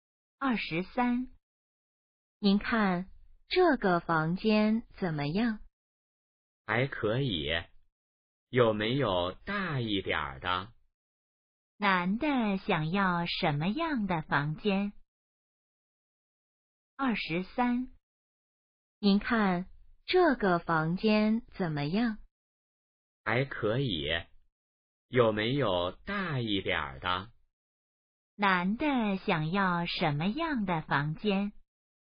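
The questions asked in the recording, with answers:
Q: 男的想要什么样的房间?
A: 大一点的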